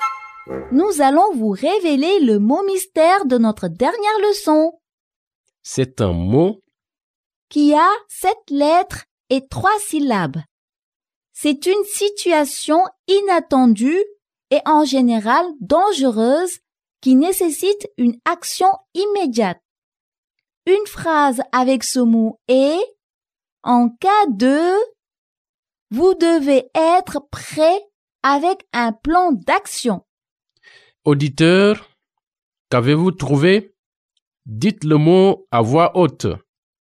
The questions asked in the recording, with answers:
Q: Auditeur, qu'avez-vous trouvé?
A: Le mot mystère d'aujourd'hui est urgence.